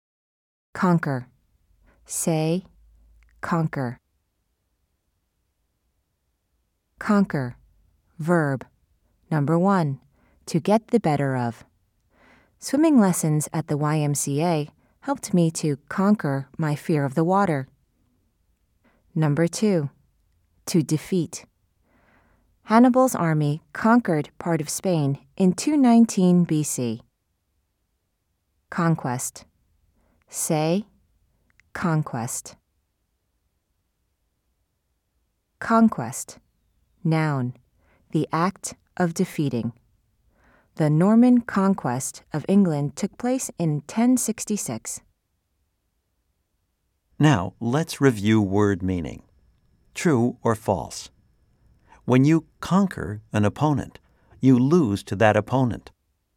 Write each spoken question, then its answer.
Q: True or false? When you conquer an opponent, you lose to that opponent.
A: If you said false, you are correct.